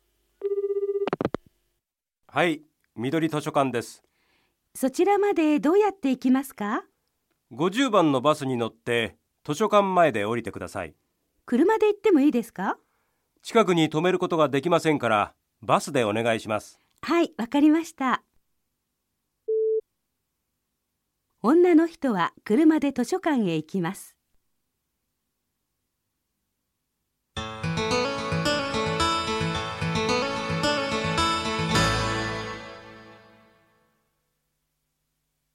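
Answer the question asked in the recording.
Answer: ×(バスで行きます)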